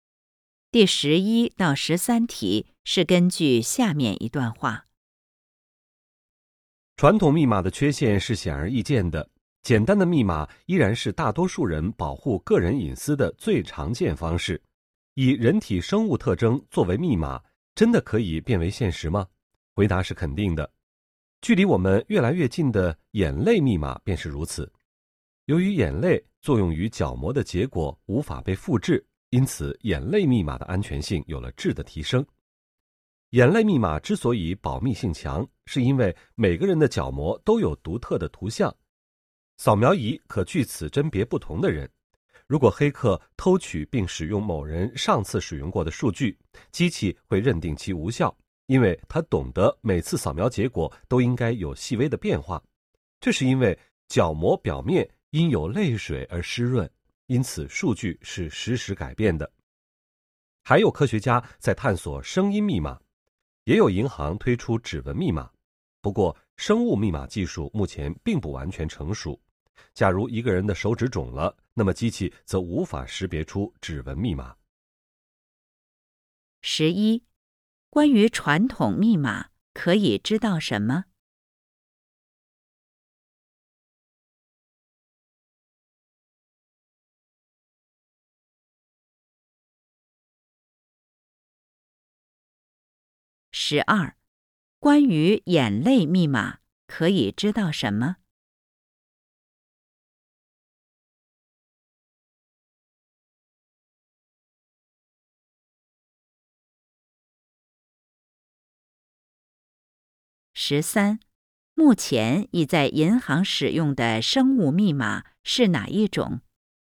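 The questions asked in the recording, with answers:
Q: 目前已在银行使用的生物密码是哪一种?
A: 指纹密码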